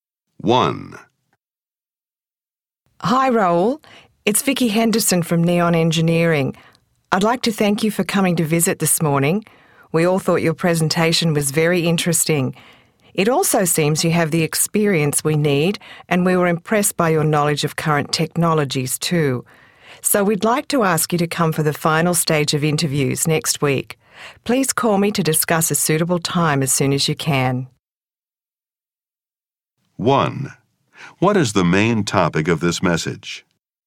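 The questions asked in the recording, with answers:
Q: What is the main topic of this message?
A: An invitation to the final stage of job interviews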